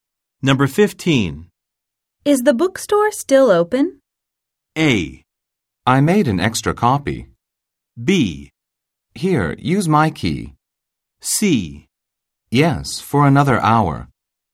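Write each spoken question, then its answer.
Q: Is the bookstore still open?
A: C: Yes, for another hour.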